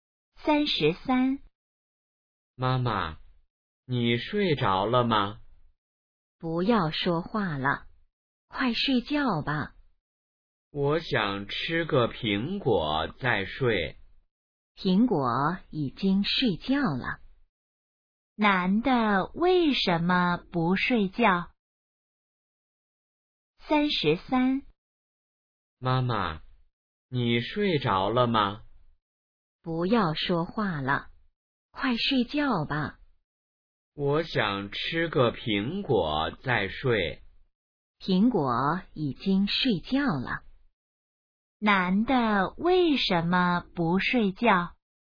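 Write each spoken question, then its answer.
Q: 男的为什么不睡觉?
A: 想吃个苹果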